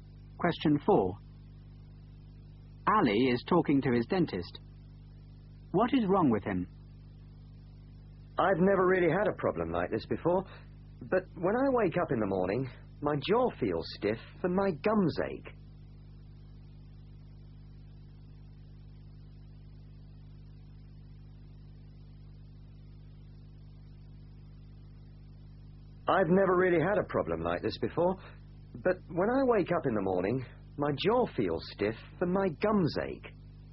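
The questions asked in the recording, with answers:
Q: What is wrong with him?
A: His jaw feels stiff and his gums ache in the morning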